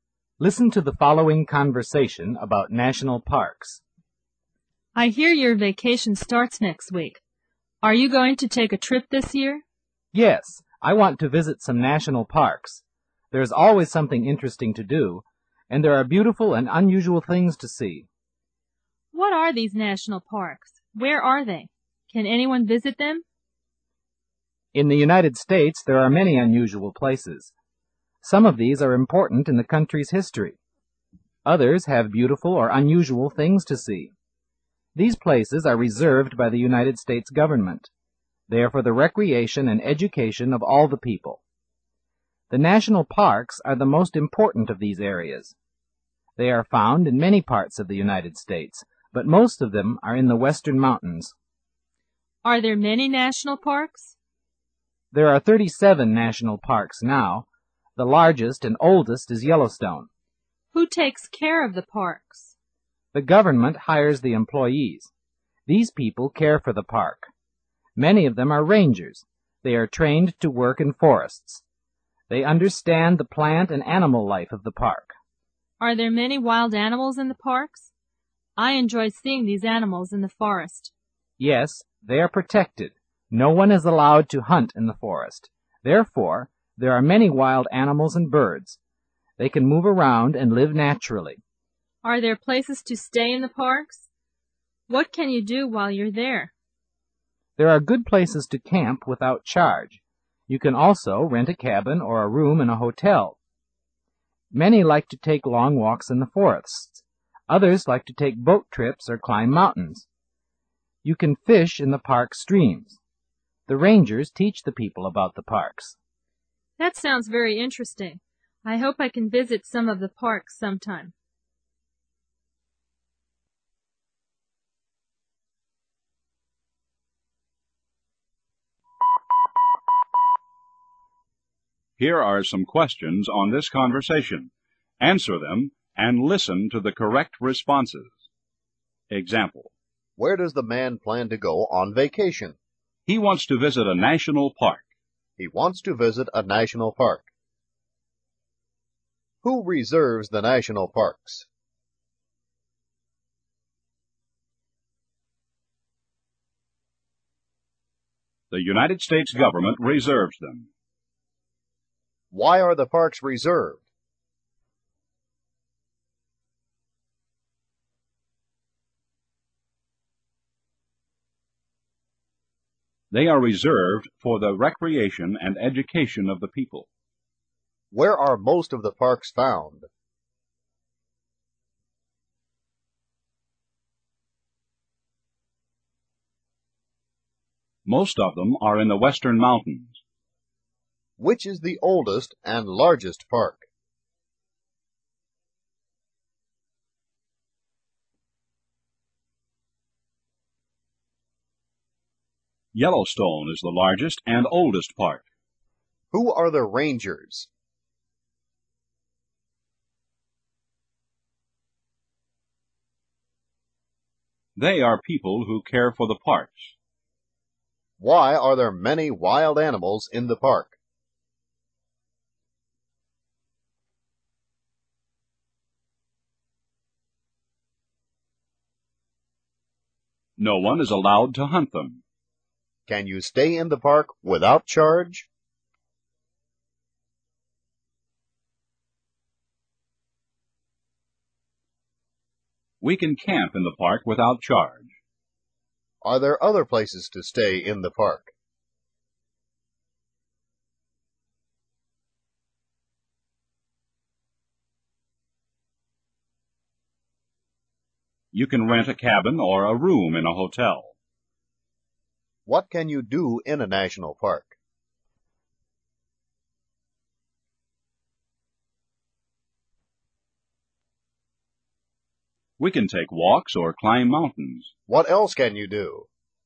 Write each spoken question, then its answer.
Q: Who reserves the national parks?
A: The United States government reserves them.

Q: Why are the parks reserved?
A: They are reserved for the recreation and education of the people.

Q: Where are most of the parks found?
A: Most of them are in the Western Mountains.

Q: Which is the oldest and largest park?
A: Yellowstone is the largest and oldest park.

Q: Who are the rangers?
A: They are people who care for the parks.

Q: Why are there many wild animals in the park?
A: No one is allowed to hunt them.

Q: Can you stay in the park without charge?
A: We can camp in the park without charge.

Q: Are there other places to stay in the park?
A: You can rent a cabin or a room in a hotel.

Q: What else can you do?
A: We can take boat trips and fish.